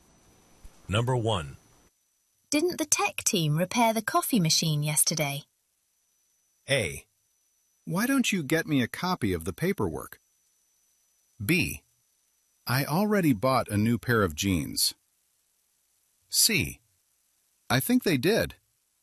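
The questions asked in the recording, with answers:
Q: Didn't the tech team repair the coffee machine yesterday?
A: C: I think they did.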